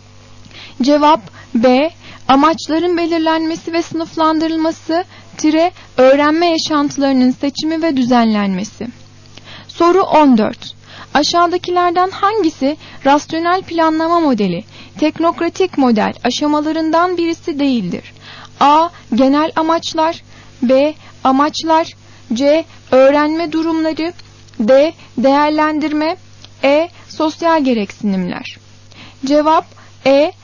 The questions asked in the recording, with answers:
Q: Aşağıdakilerden hangisi rasyonel planlama modeli, teknokratik model aşamalarından birisi değildir?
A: Cevap E. Sosyal gereksinimler.